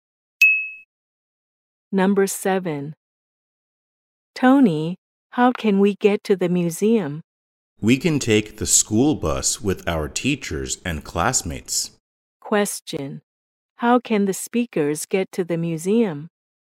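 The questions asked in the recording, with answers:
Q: How can the speakers get to the museum?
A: By school bus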